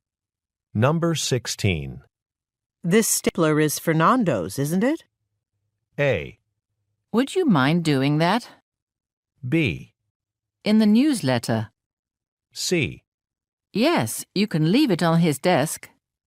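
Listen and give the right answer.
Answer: C: Yes, you can leave it on his desk.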